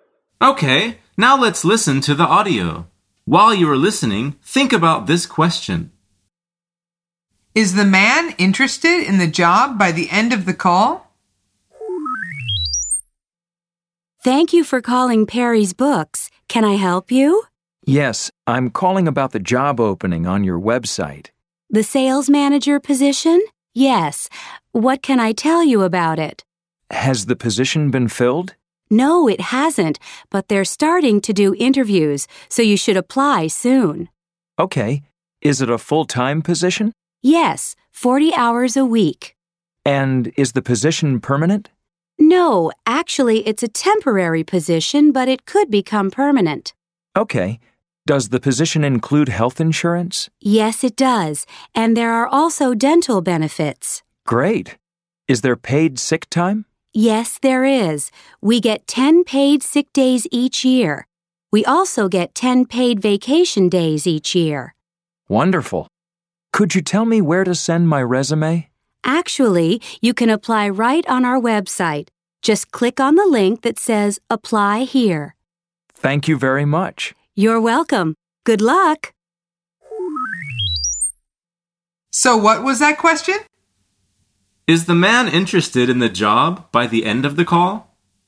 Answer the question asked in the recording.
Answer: The answer is yes, he is.